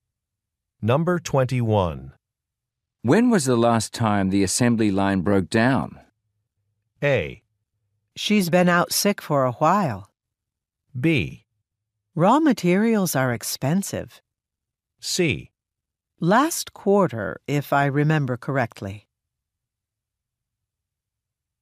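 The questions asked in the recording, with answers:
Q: When was the last time the assembly line broke down?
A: C: Last quarter, if I remember correctly.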